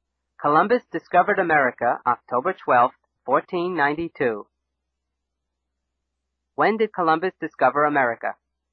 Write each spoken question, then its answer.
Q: When did Columbus discover America?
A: October 12, 1492. Columbus discovered America October 12, 1492.